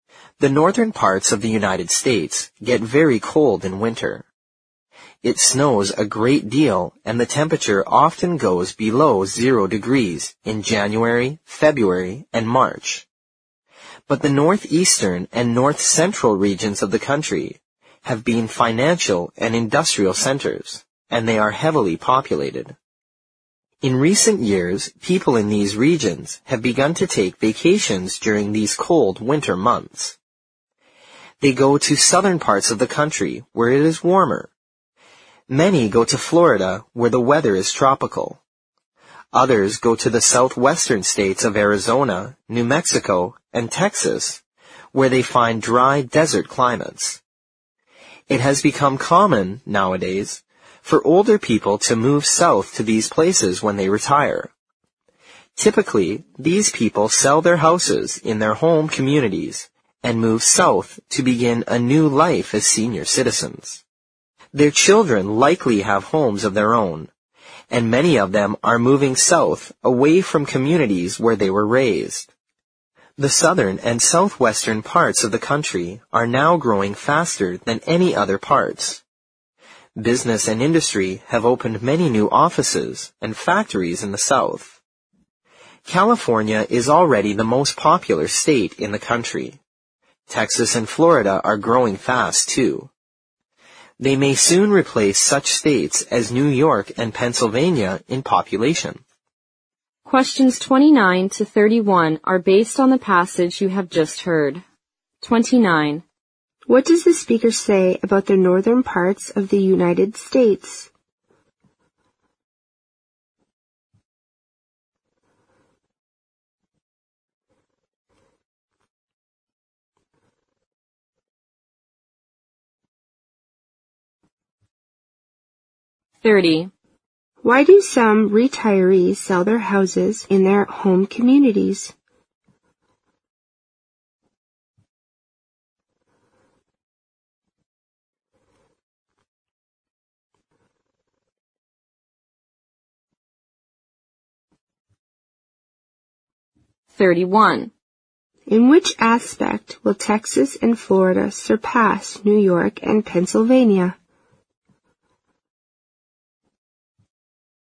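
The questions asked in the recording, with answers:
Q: Why do some retirees sell their houses in their home communities?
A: To move south and begin a new life as senior citizens.

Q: In which aspect will Texas and Florida surpass New York and Pennsylvania?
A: Population.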